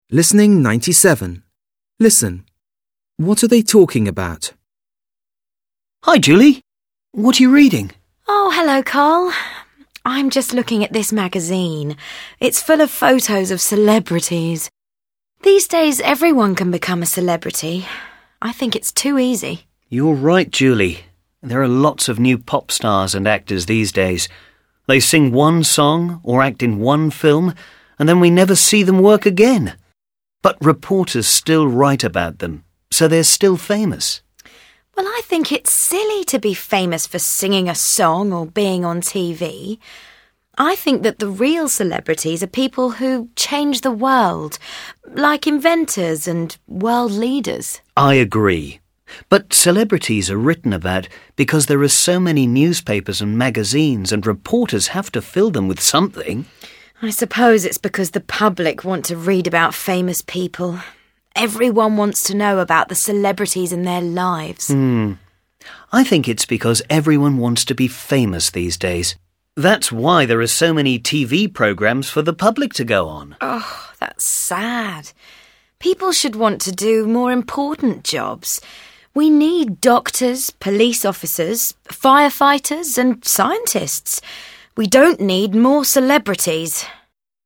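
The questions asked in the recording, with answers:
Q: What are they talking about?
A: Celebrities and why so many people are famous these days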